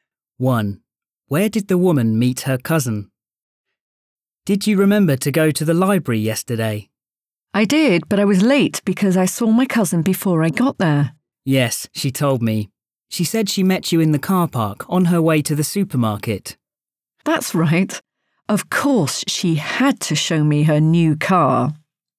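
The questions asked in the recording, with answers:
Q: Where did the woman meet her cousin?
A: In the car park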